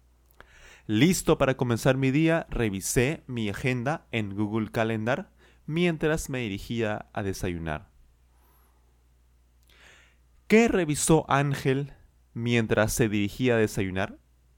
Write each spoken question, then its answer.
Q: ¿Qué revisó Ángel mientras se dirigía a desayunar?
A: Claro, su agenda en Google Calendar.